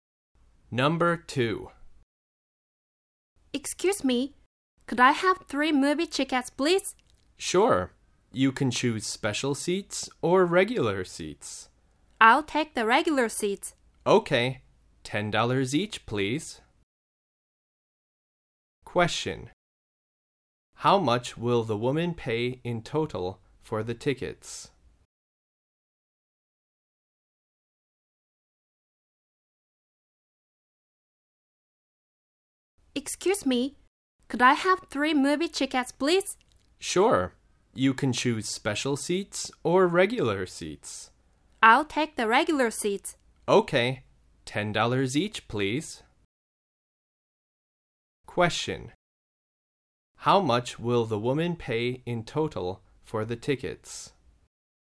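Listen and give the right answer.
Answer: $30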